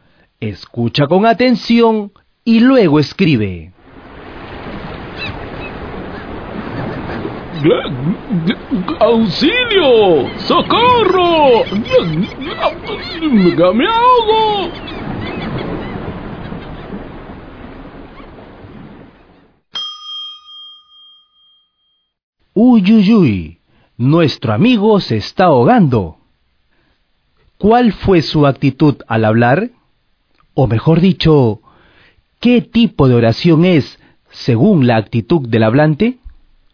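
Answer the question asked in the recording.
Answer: Oración exclamativa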